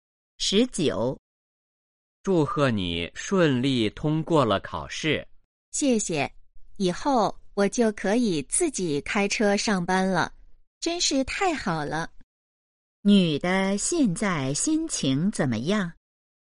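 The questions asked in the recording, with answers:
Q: 女的现在心情怎么样?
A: 很高兴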